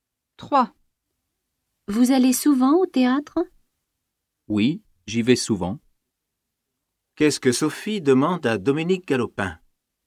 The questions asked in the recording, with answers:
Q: Qu'est-ce que Sophie demande à Dominique Galopin?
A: Elle lui demande s'il va souvent au théâtre.